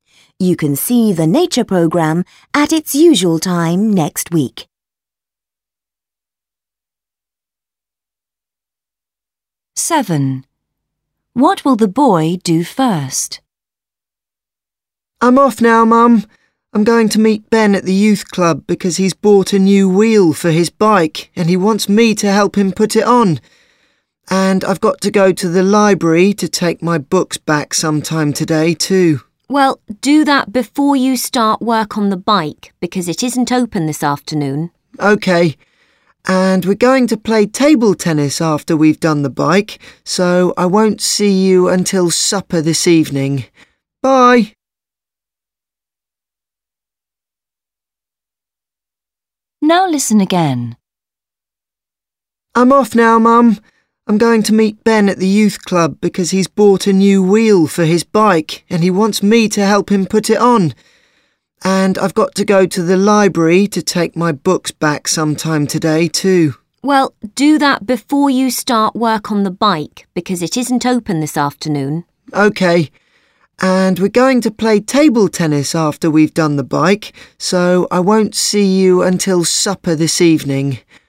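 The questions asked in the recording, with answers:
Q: What will the boy do first?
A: take his books back to the library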